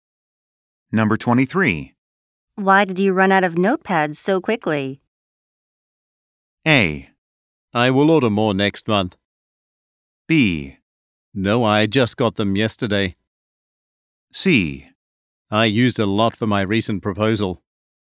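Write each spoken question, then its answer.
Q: Why did you run out of notepads so quickly?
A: C: I used a lot for my recent proposal.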